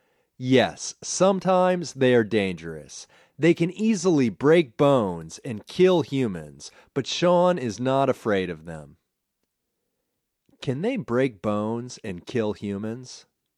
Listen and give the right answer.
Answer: Yes, they can easily break bones and kill humans.